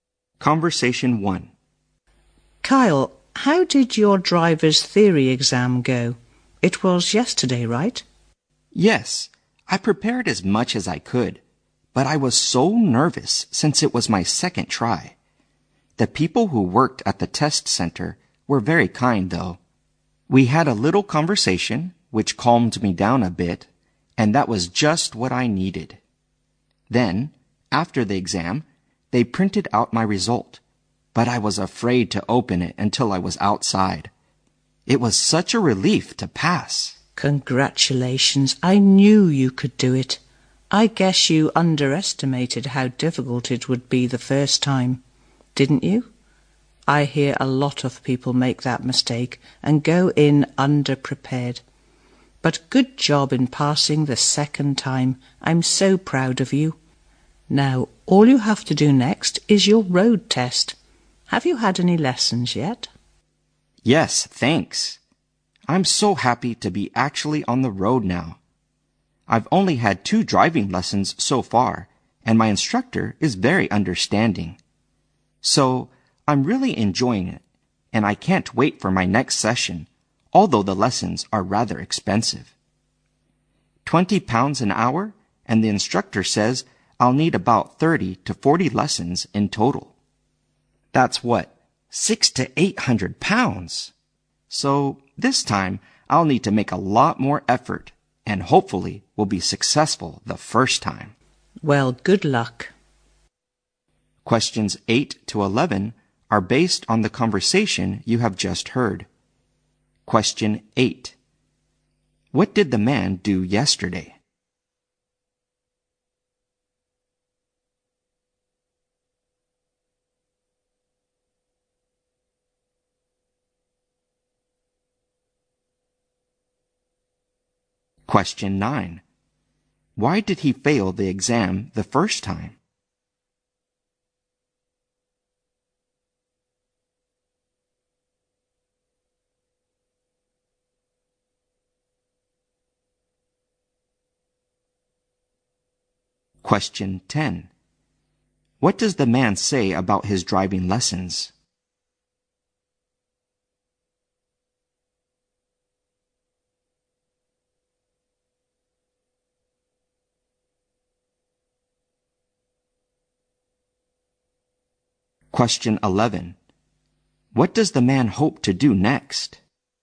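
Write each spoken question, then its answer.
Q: What did the man do yesterday?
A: He took his driver's theory exam and passed it.

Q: Why did he fail the exam the first time?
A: He underestimated how hard it was and went in underprepared.

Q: What does the man say about his driving lessons?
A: He enjoys them, but they are rather expensive.

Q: What does the man hope to do next?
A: Pass his road test on the first try.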